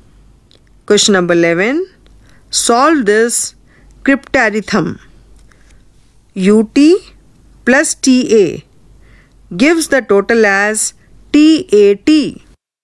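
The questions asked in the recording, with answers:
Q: Solve this crypterythm.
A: U=9, T=1, A=0 (91+10=101)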